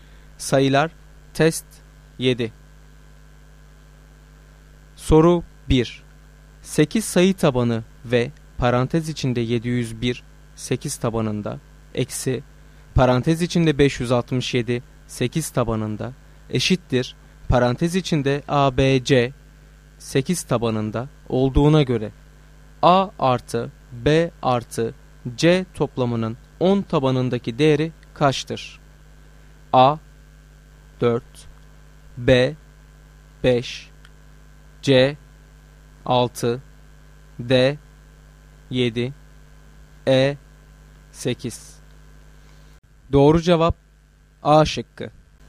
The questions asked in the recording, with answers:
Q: 8 sayı tabanı ve parantez içinde 701 8 tabanında eksi parantez içinde 567 8 tabanında eşittir parantez içinde ABC 8 tabanında olduğuna göre A artı B artı C toplamının 10 tabanındaki değeri kaçtır?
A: Doğru cevap A şıkkı.